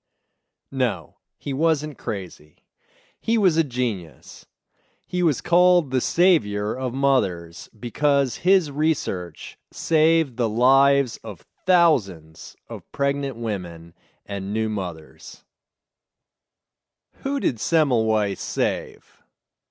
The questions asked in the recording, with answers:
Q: Who did Semmelweis save?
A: Semmelweis saved thousands of pregnant women and new mothers.